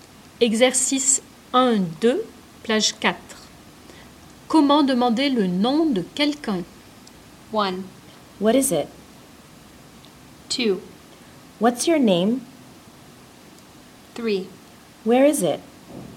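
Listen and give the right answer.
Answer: 2: What's your name?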